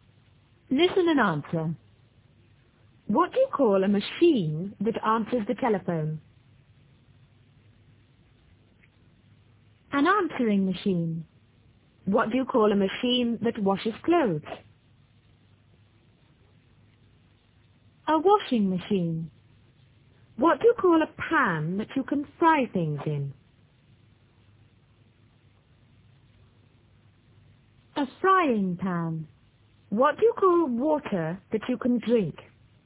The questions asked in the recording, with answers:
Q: What do you call a machine that answers the telephone?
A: An answering machine.

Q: What do you call a machine that washes clothes?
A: A washing machine.

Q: What do you call a pan that you can fry things in?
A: A frying pan.